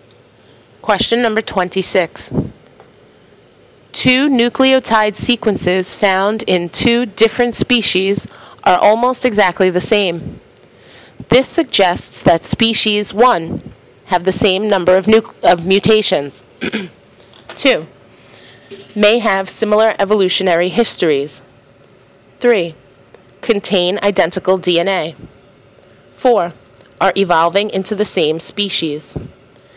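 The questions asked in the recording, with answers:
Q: 2 nucleotide sequences found in 2 different species are almost exactly the same.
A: 2: May have similar evolutionary histories.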